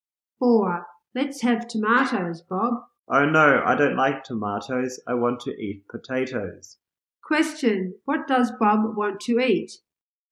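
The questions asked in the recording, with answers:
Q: What does Bob want to eat?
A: Potatoes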